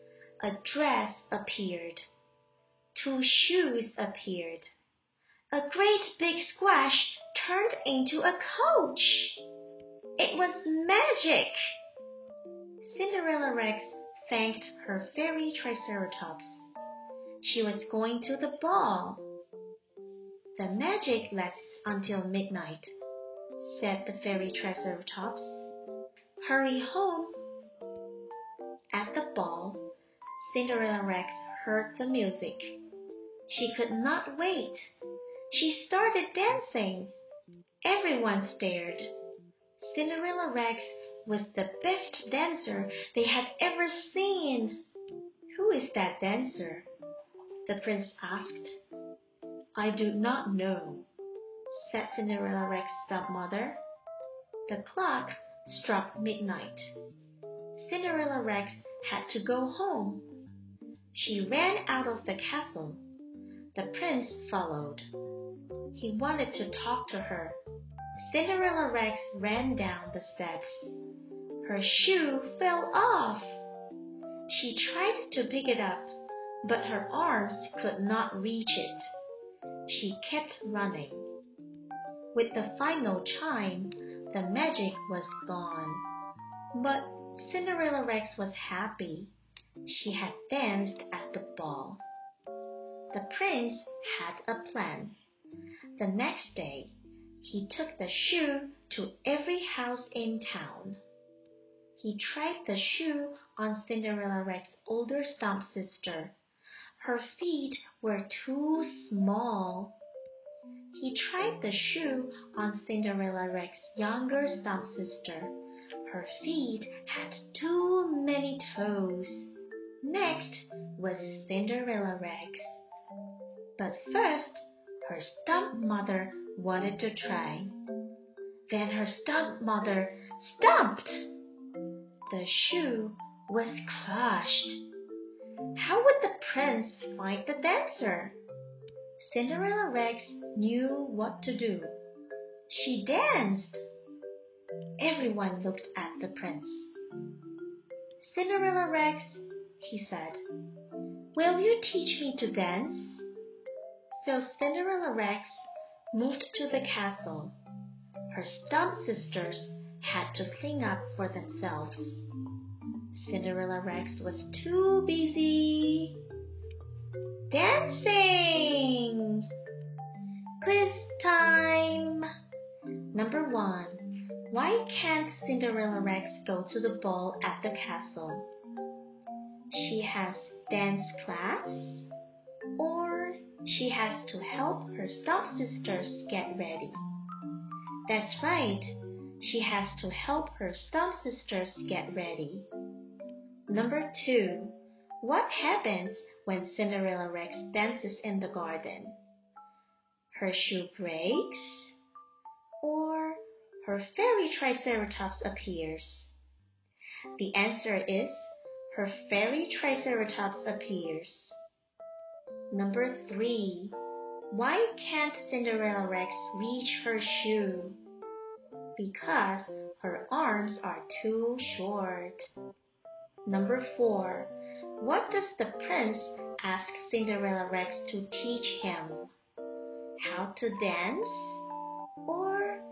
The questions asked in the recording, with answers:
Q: What does the prince ask Cinderella Rex to teach him?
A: The answer is how to dance.